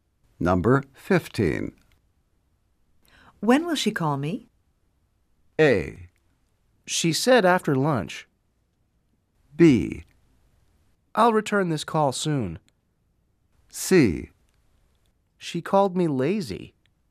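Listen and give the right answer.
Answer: A: She said after lunch.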